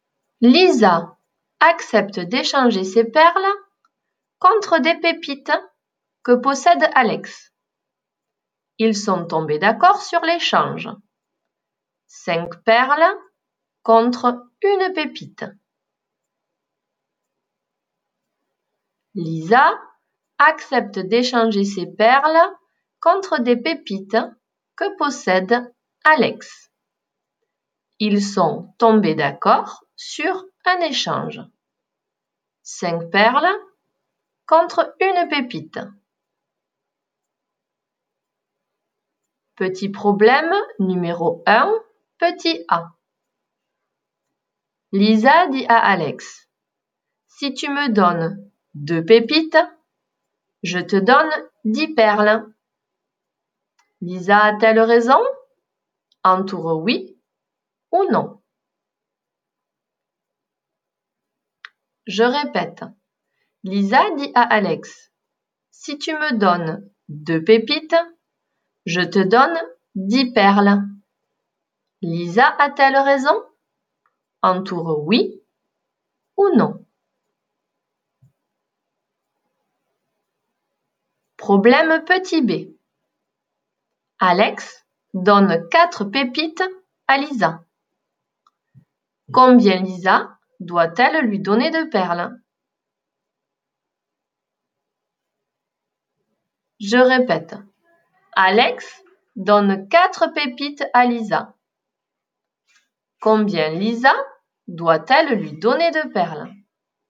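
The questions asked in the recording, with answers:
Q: Lisa dit à Alex, « Si tu me donnes 2 pépites, je te donne 10 perles. » Lisa a-t-elle raison?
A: oui

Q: Combien Lisa doit-elle lui donner de perles?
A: 20 perles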